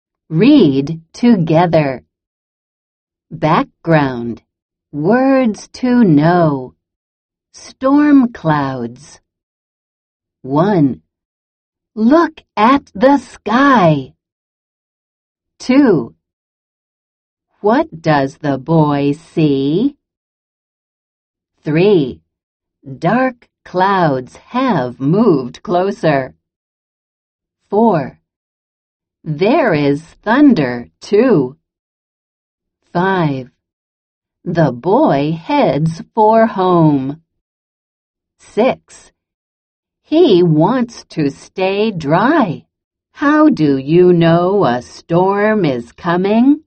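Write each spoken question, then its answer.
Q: How do you know a storm is coming?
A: Dark clouds have moved closer and there is thunder.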